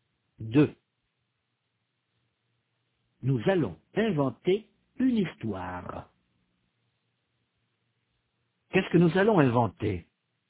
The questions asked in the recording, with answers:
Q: Qu'est-ce que nous allons inventer?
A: Une histoire.